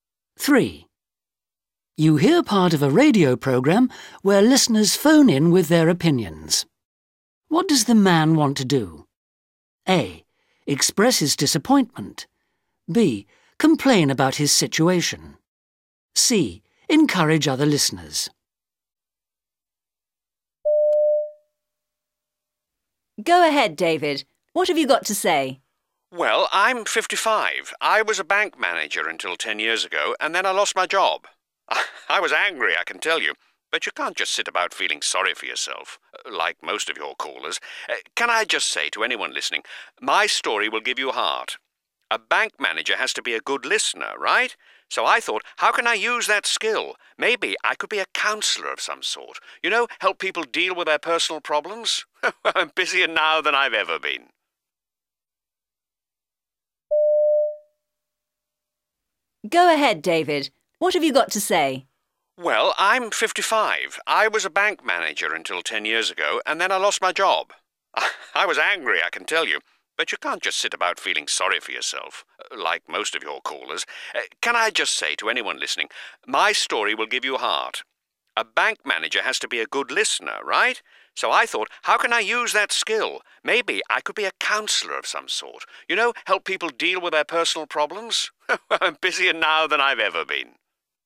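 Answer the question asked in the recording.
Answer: C: Encourage other listeners.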